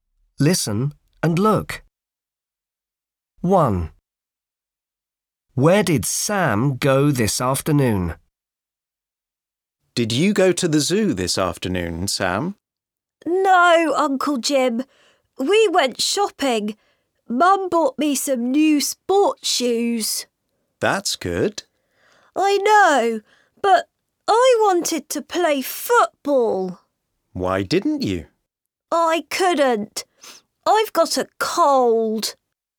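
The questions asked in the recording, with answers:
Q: Where did Sam go this afternoon?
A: shopping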